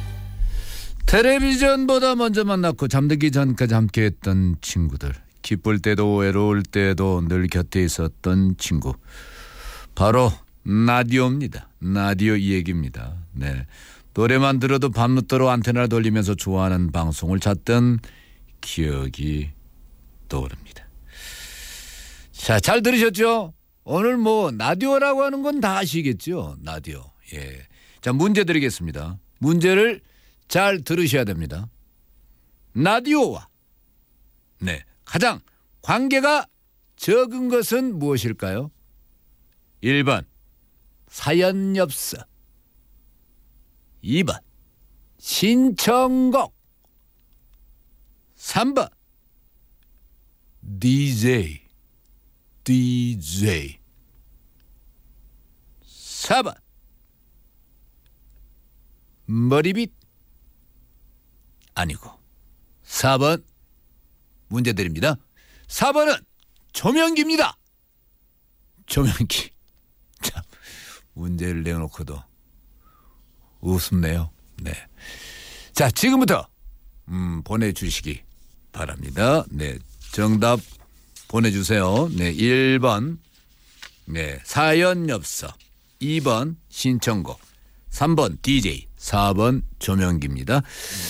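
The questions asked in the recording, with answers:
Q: 라디오와 네, 가장 관계가 적은 것은 무엇일까요?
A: 4번: 조명기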